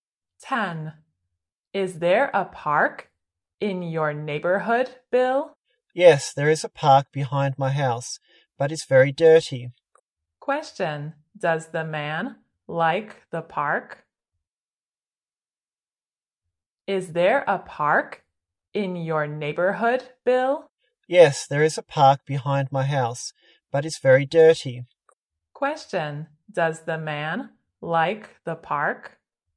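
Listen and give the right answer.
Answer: No, it's very dirty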